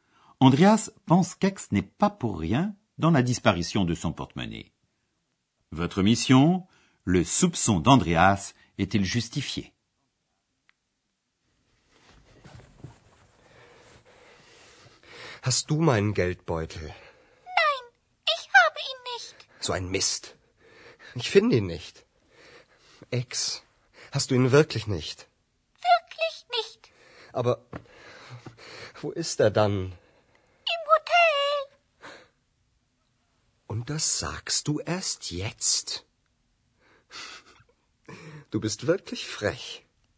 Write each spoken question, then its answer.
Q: le soupçon d'Andreas est-il justifié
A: Ainsi, ce n'est pas X qui a fait disparaître le porte-monnaie.